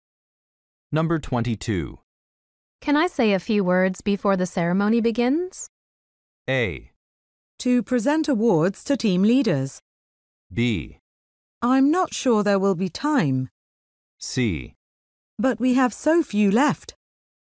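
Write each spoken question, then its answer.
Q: Can I say a few words before the ceremony begins?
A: B: I'm not sure there will be time.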